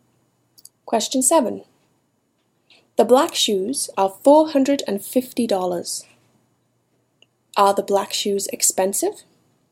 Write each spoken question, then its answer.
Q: Are the black shoes expensive?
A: Yes. The black shoes are expensive.